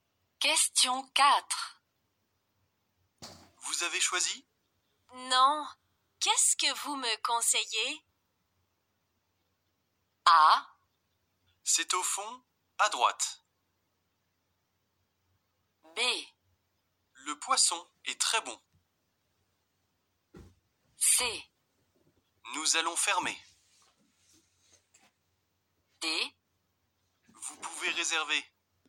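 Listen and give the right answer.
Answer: B: Le poisson est très bon.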